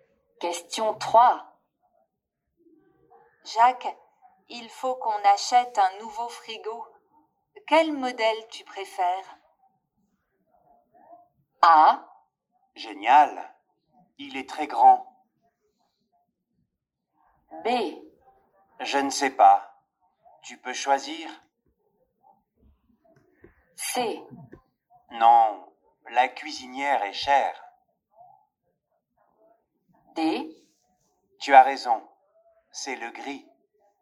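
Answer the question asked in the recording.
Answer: B: Je ne sais pas. Tu peux choisir.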